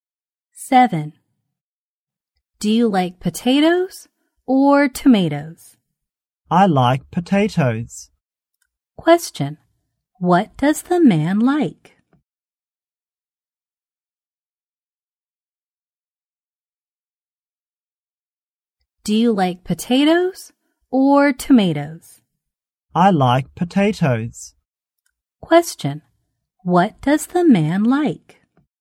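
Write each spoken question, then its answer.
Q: What does the man like?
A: Potatoes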